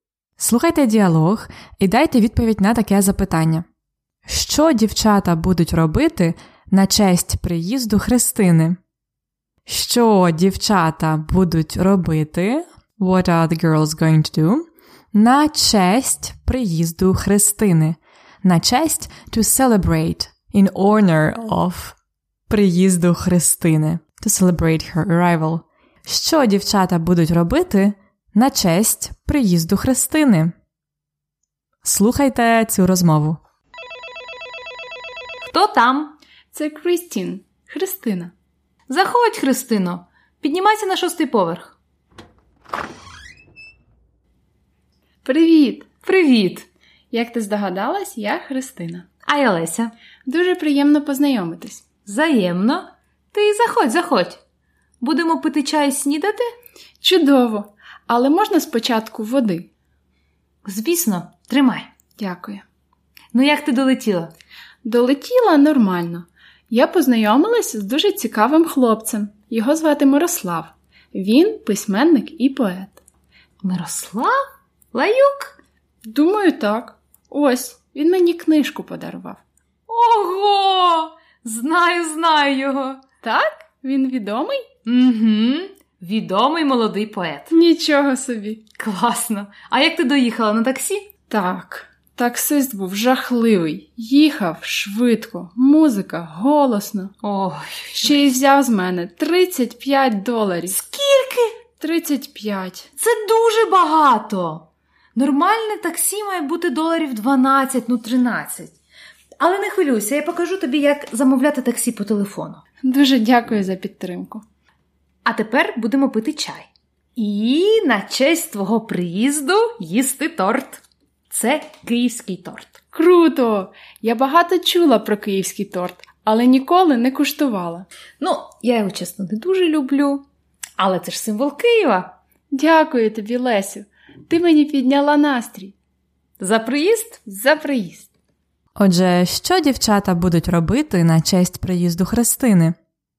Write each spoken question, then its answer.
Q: Що дівчата будуть робити на честь приїзду Христини?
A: Вони будуть пити чай і їсти київський торт.